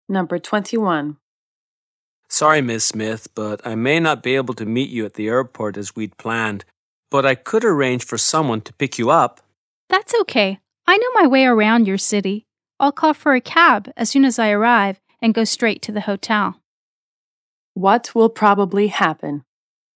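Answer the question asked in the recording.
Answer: Miss Smith will take a taxi to her hotel.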